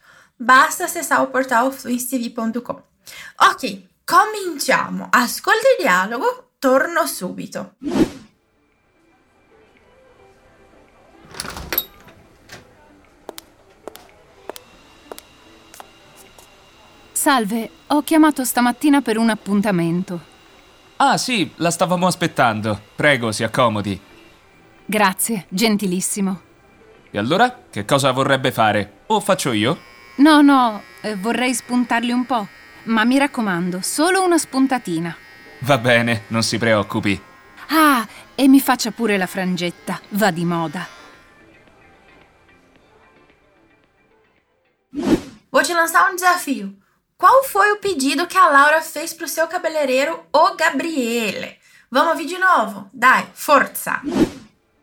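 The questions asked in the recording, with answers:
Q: Qual foi o pedido que a Laura fez pro seu cabeleireiro, o Gabriele?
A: Cortar só um pouco as pontas e fazer uma franjinha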